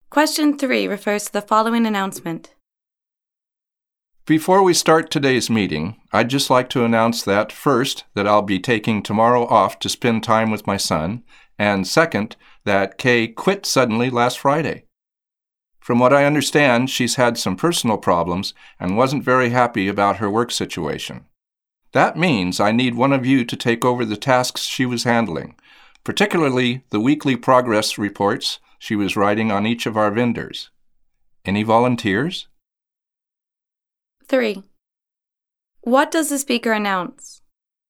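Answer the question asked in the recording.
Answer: He will take tomorrow off, and Kay quit suddenly last Friday.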